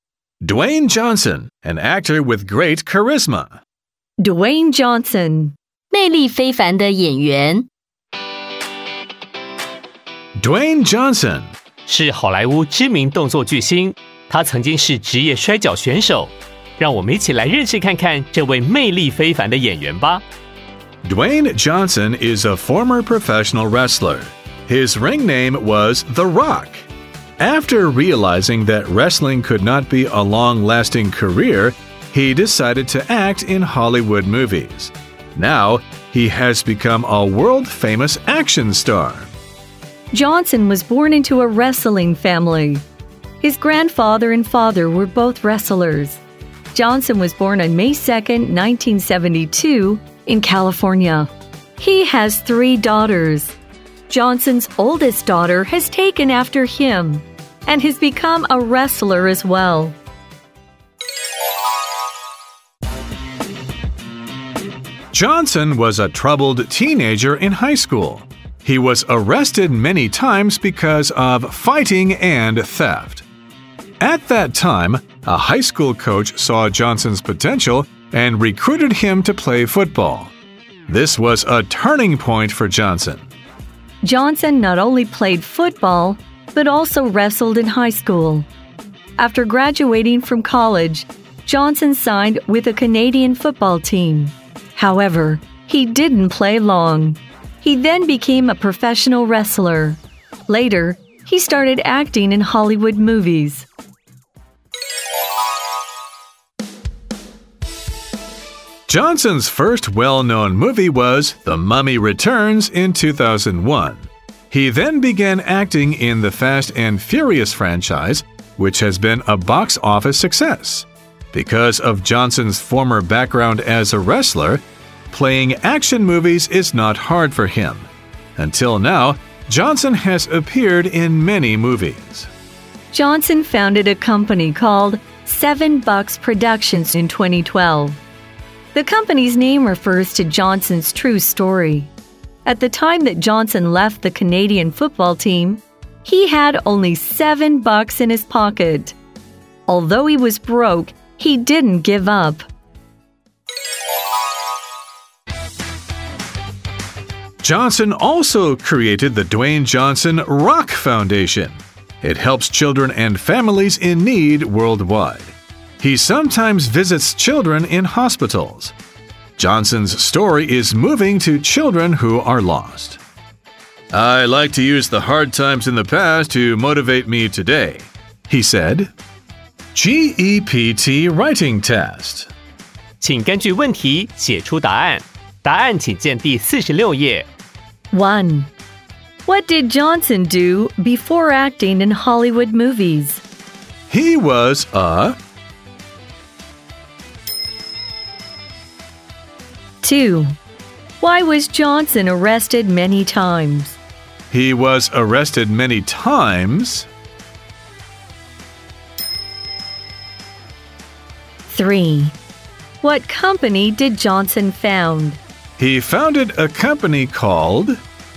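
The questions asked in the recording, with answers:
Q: What did Johnson do before acting in Hollywood movies?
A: He was a professional wrestler.

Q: Why was Johnson arrested many times?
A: Because of fighting and theft.

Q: What company did Johnson found?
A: Seven Bucks Productions.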